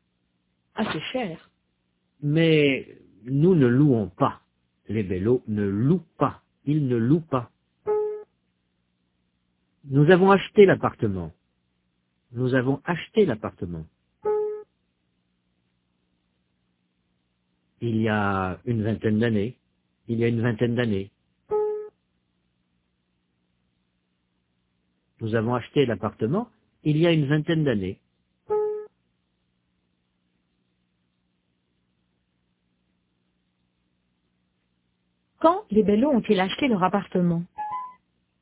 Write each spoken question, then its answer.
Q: Quand les Bello ont-ils acheté leur appartement?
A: Il y a une vingtaine d'années.